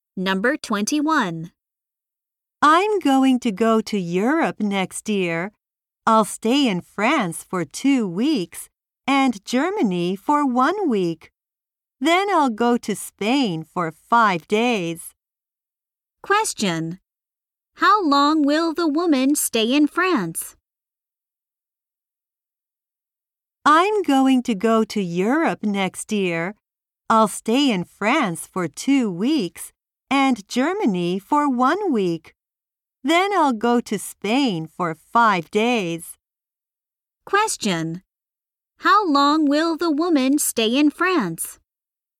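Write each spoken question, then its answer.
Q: How long will the woman stay in France?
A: For 2 weeks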